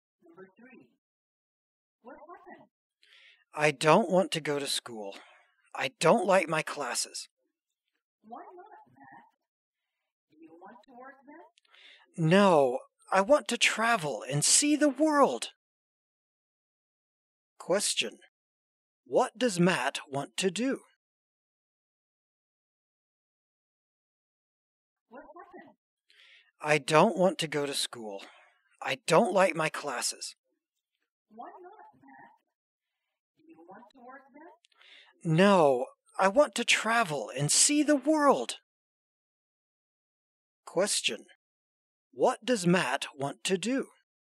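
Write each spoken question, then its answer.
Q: What does Matt want to do?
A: Travel and see the world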